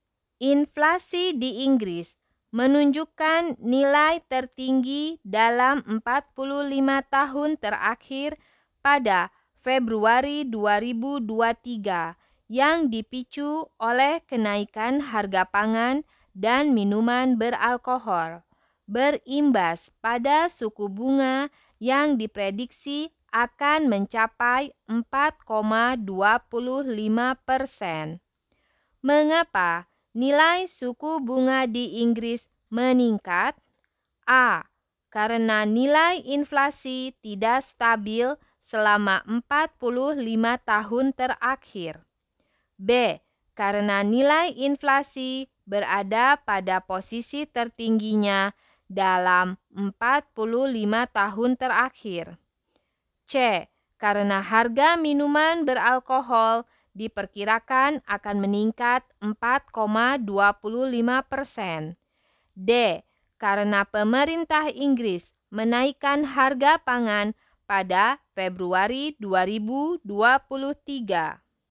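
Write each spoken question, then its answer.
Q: Mengapa nilai suku bunga di Inggris meningkat?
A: B: Karena nilai inflasi berada pada posisi tertingginya dalam 45 tahun terakhir.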